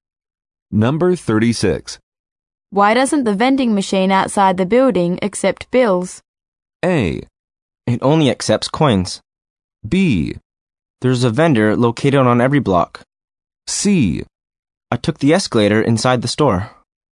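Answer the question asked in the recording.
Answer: A: It only accepts coins.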